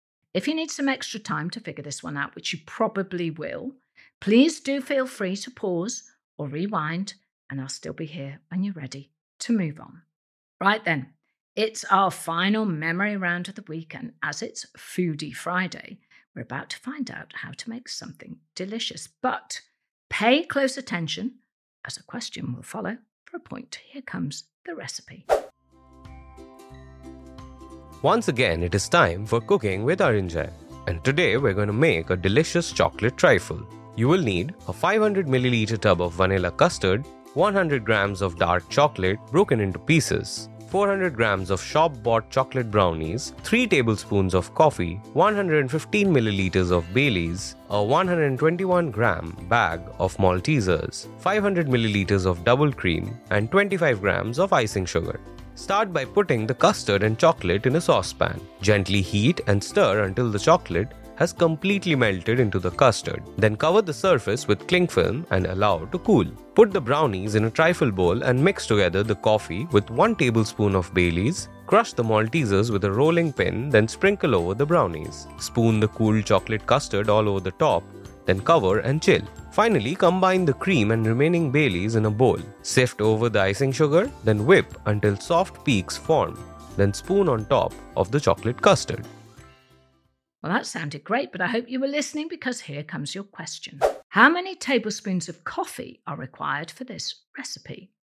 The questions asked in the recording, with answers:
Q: How many tablespoons of coffee are required for this recipe?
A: you need 3 tablespoons of coffee